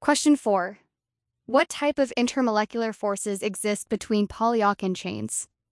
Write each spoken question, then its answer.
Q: What type of intermolecular forces exist between polyalkene chains?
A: Induced dipole-dipole interactions, also called London dispersion forces.